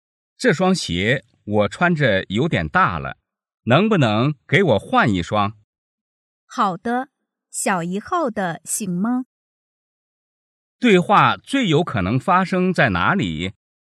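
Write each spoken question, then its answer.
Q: 对话最有可能发生在哪里?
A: 鞋店

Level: 汉语水平考试(MHK)三级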